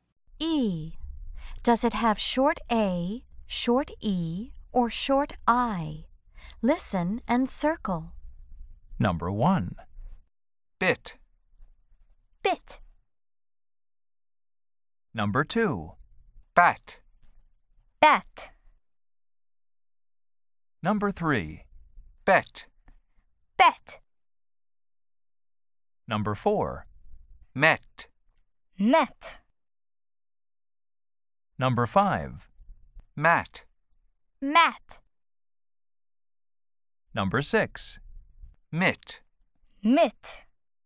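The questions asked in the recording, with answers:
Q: Does it have short A, short E, or short I?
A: short I

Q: Does it have short A, short E, or short I?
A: short A

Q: Does it have short A, short E, or short I?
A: short E

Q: Does it have short A, short E, or short I?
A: short E

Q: Does it have short A, short E, or short I?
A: short A

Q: Does it have short A, short E, or short I?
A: short I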